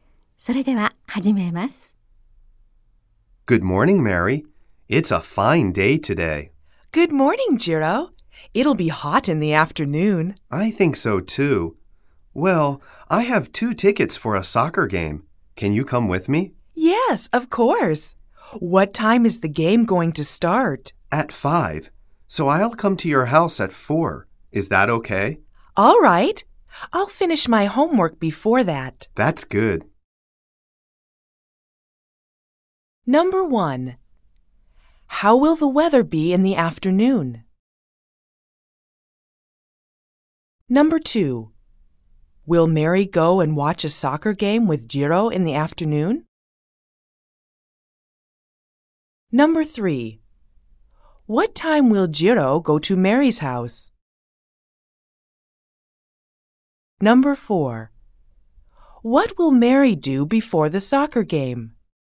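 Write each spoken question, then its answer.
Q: How will the weather be in the afternoon?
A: It will be hot.

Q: Will Mary go and watch a soccer game with Jiro in the afternoon?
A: Yes, she will.

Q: What time will Jiro go to Mary's house?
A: At 4.

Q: What will Mary do before the soccer game?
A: She will finish her homework.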